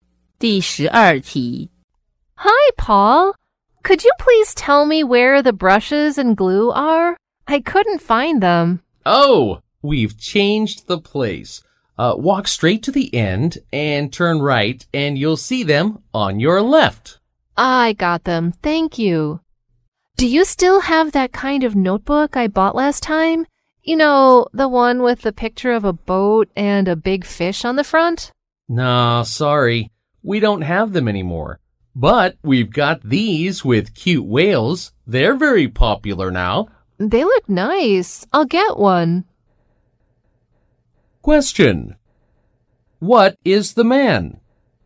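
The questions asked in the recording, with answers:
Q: What is the man?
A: A clerk in a stationery store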